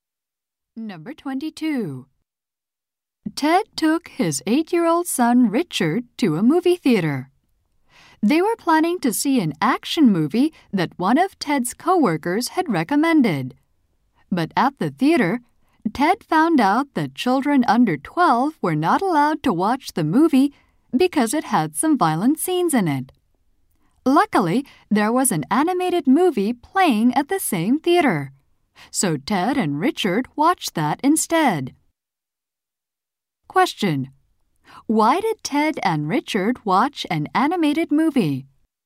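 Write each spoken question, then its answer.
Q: Why did Ted and Richard watch an animated movie?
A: Children under 12 couldn't see the action movie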